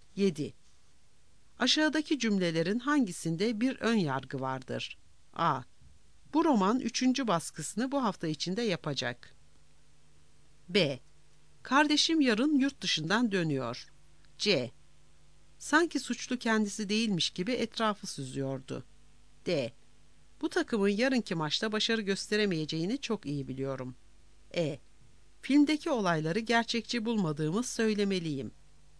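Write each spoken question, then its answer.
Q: Aşağıdaki cümlelerin hangisinde bir ön yargı vardır?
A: D: Bu takımın yarınki maçta başarı gösteremeyeceğini çok iyi biliyorum.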